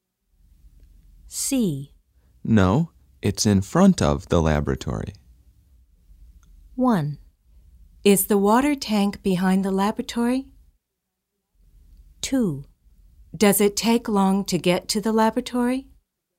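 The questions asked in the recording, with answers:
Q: No, it's in front of the laboratory.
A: 1: Is the water tank behind the laboratory?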